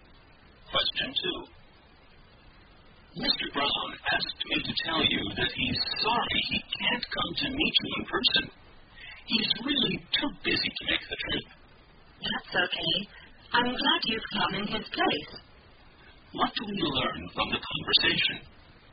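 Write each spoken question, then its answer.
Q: What do we learn from the conversation?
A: Mr. Brown was too busy to come, so someone came in his place.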